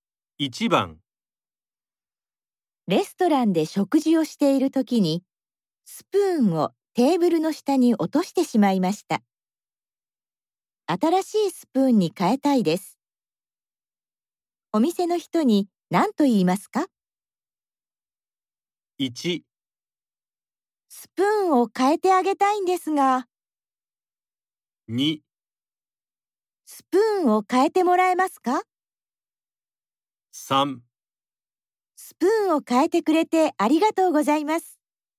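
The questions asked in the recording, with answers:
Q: 新しいスプーンに変えたいです。お店の人に何と言いますか?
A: 2: スプーンを変えてもらえますか?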